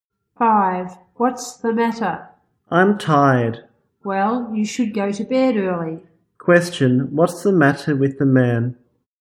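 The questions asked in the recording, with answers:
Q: what's the matter with the man?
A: He is tired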